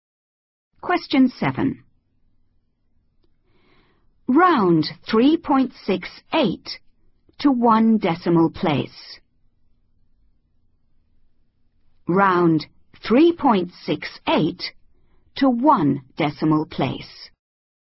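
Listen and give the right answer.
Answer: 3.7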